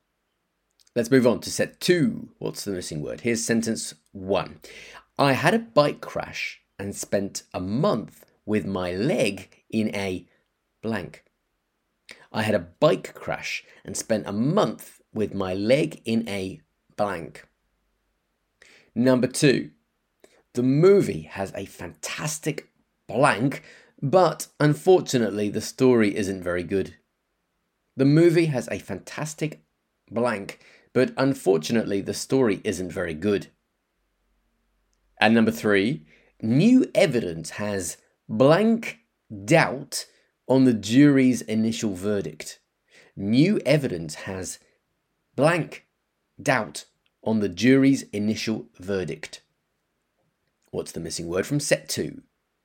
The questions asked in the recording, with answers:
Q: What's the missing word from set two?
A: So the missing word was cast, C-A-S-T, cast.